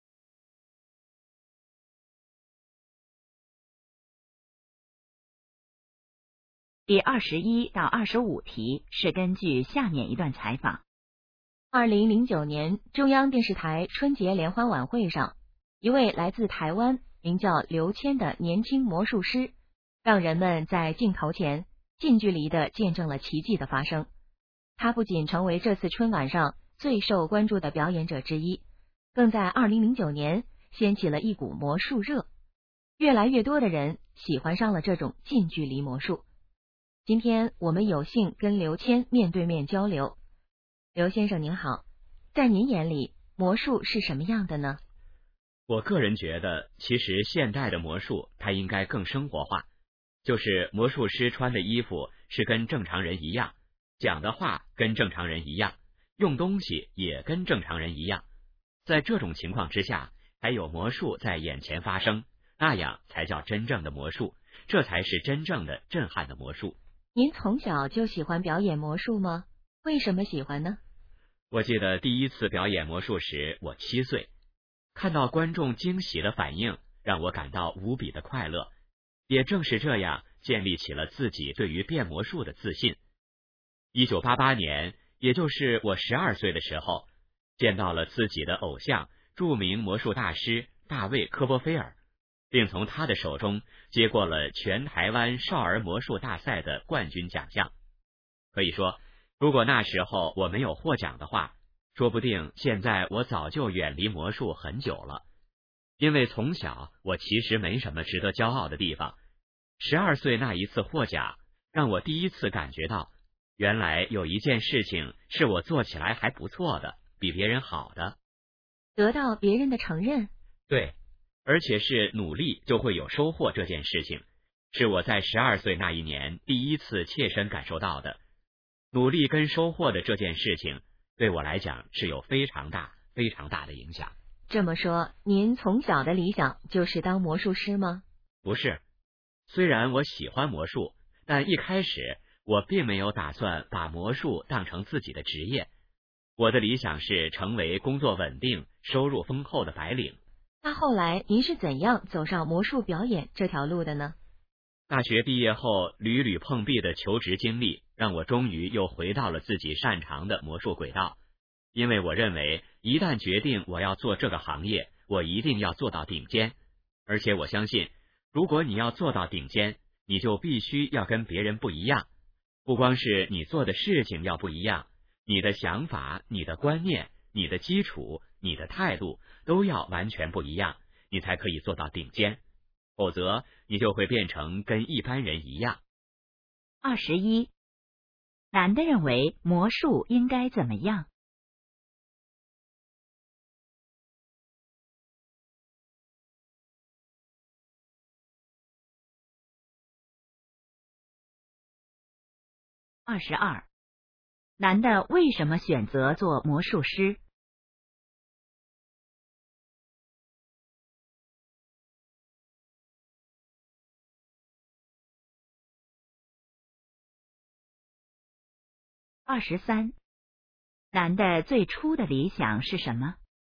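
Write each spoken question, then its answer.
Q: 男的认为魔术应该怎么样?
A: 更生活化

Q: 男的最初的理想是什么?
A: 成为工作稳定、收入丰厚的白领

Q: 男的认为怎样才能做到最好?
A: 必须跟别人不一样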